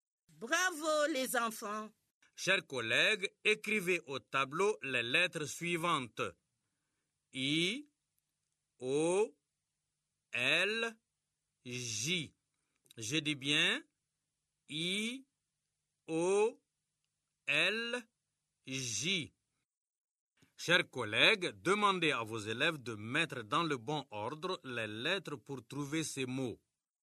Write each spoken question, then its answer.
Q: Chers collègues, demandez à vos élèves de mettre dans le bon ordre les lettres pour trouver ces mots.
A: Monsieur, c'est joli.